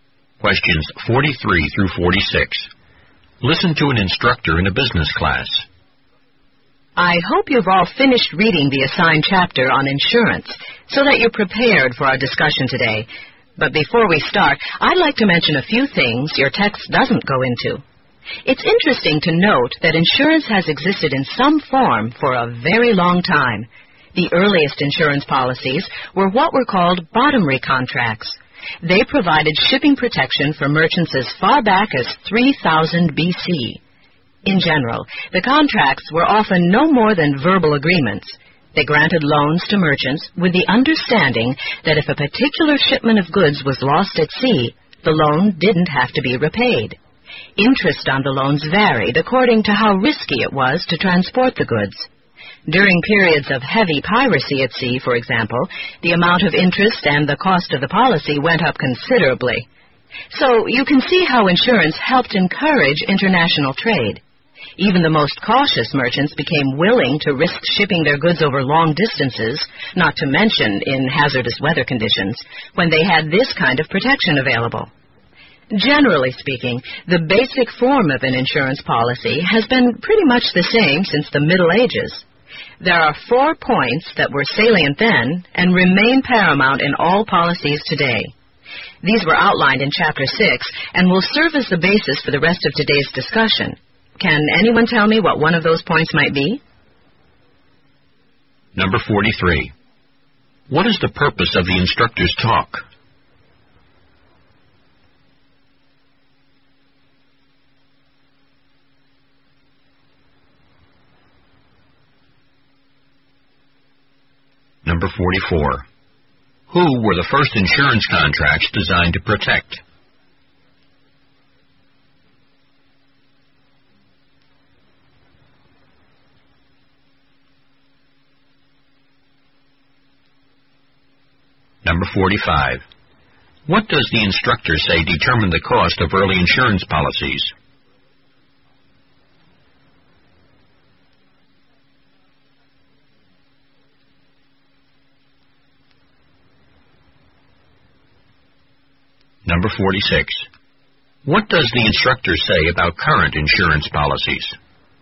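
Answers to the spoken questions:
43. To give background on the history of insurance before the class discussion
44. Merchants shipping goods by sea
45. How risky it was to transport the goods
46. Their basic form has stayed much the same since the Middle Ages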